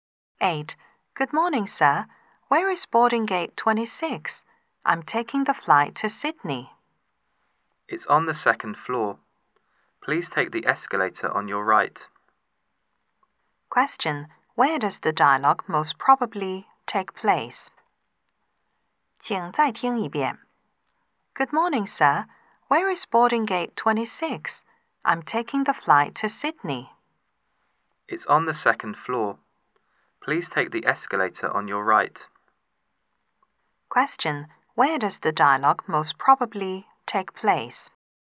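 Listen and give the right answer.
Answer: At an airport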